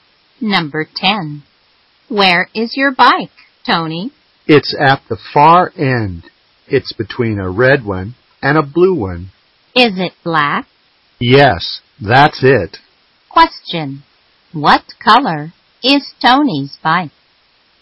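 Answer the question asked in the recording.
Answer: Black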